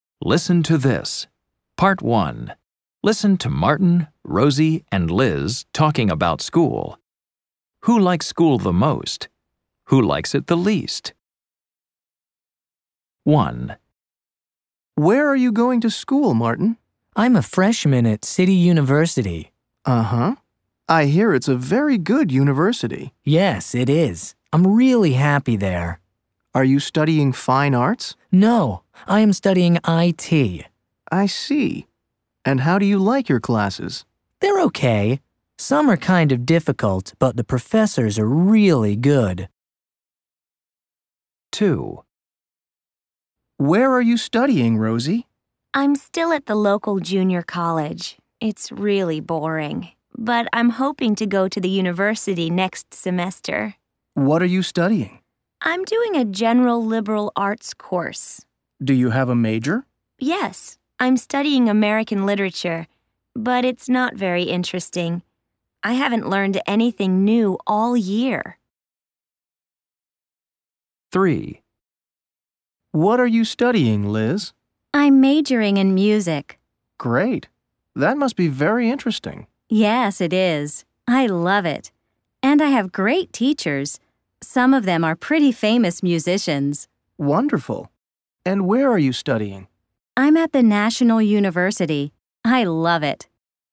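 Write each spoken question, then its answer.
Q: Who likes it the least?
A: Rosie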